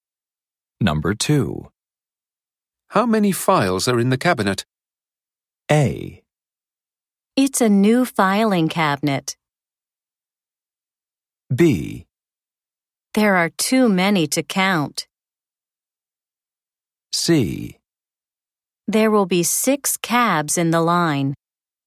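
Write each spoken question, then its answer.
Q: How many files are in the cabinet?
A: B: There are too many to count.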